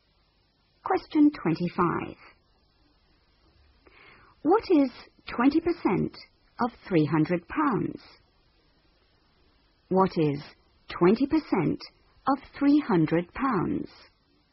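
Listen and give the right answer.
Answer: £60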